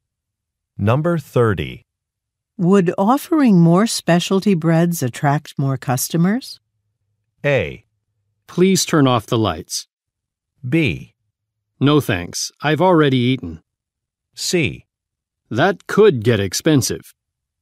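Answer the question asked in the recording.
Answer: C: That could get expensive.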